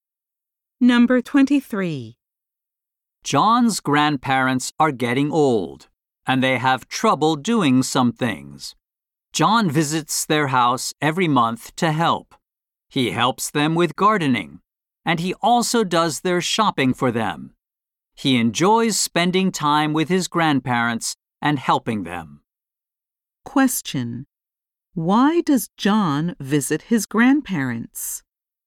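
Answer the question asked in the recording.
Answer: To help them with gardening and shopping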